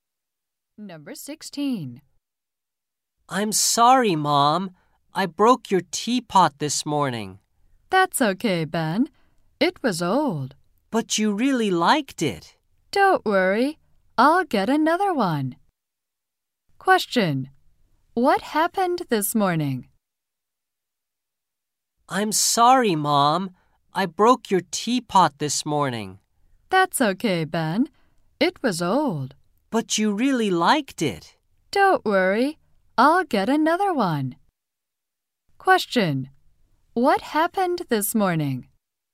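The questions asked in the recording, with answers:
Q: What happened this morning?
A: Ben broke his mother's teapot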